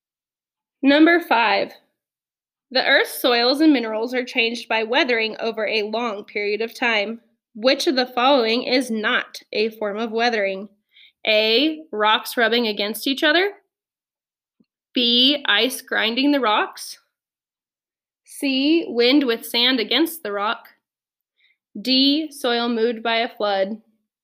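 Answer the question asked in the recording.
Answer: D: soil moved by a flood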